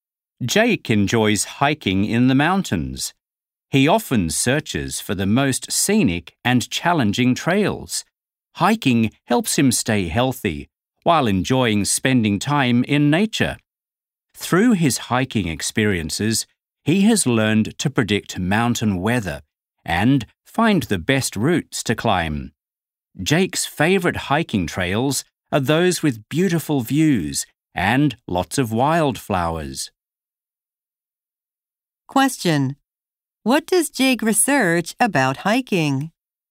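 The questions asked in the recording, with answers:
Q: What does Jake research about hiking?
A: The most scenic and challenging trails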